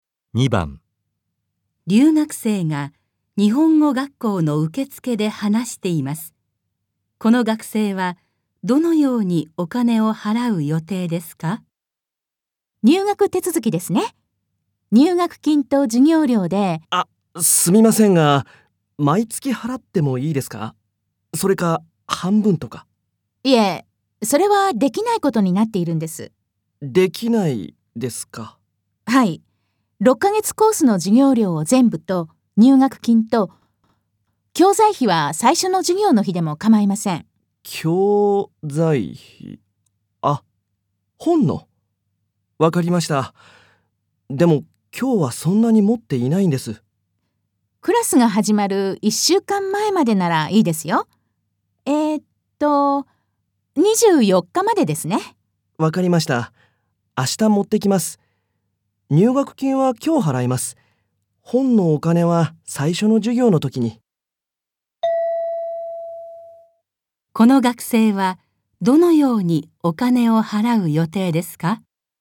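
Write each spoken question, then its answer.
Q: この学生はどのようにお金を払う予定ですか?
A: 入学金は今日、授業料は明日、教材費は最初の授業の日に払う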